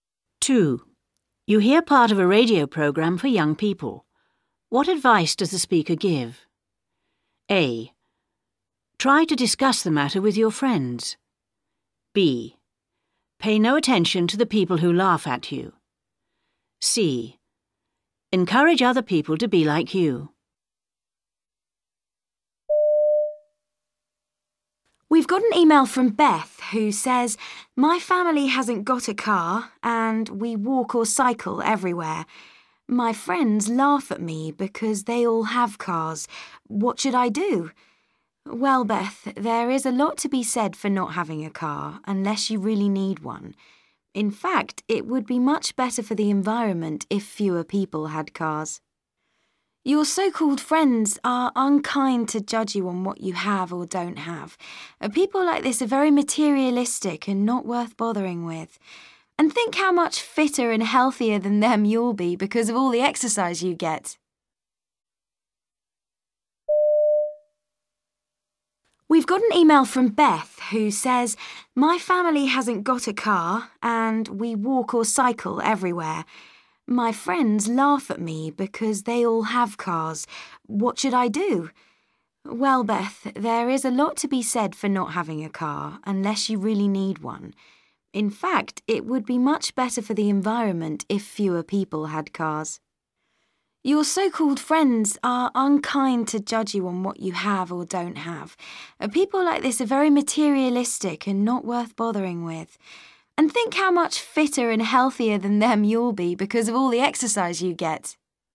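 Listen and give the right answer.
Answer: B: Pay no attention to the people who laugh at you.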